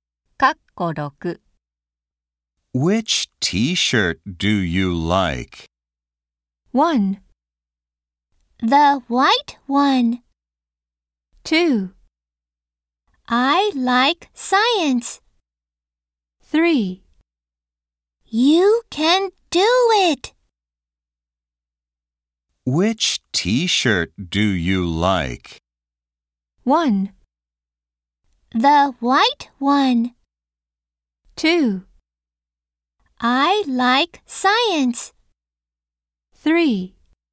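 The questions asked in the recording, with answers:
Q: Which t-shirt do you like?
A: 1: The white one.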